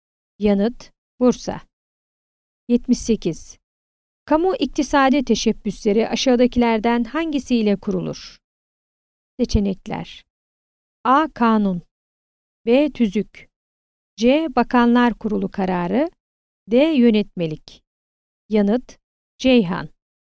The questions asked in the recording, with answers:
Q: Kamu iktisadi teşebbüsleri aşağıdakilerden hangisiyle kurulur?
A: Yanıt: Ceyhan.